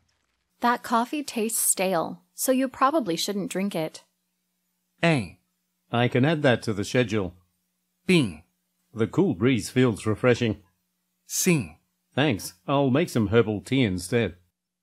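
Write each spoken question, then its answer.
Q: That coffee tastes stale, so you probably shouldn't drink it.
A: C: Thanks. I'll make some herbal tea instead.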